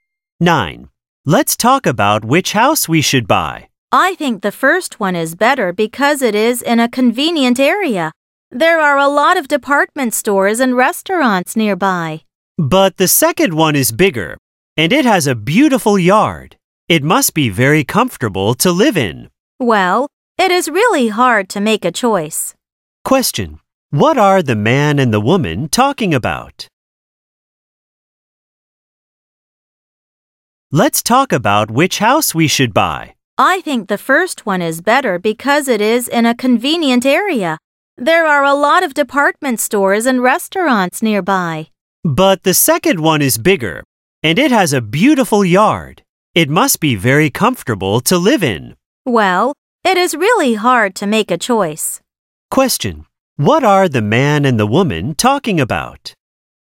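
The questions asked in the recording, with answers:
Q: What are the man and the woman talking about?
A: Which house to buy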